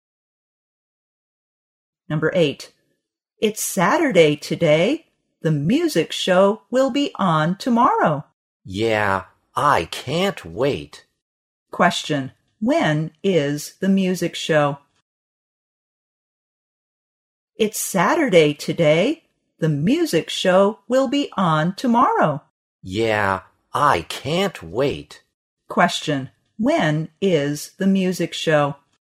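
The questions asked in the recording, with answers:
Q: when is the music show?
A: Sunday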